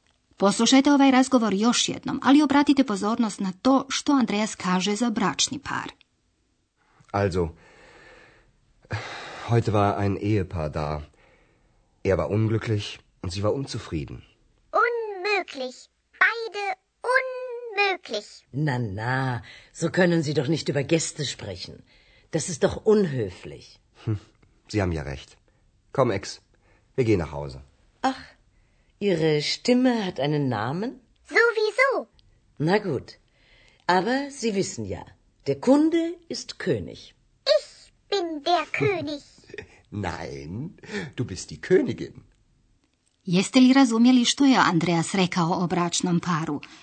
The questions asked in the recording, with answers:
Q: Jeste li razumjeli što je Andreas rekao o bračnom paru?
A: Za muškarca je rekao da je nesretan, a žena da je nezadovoljna.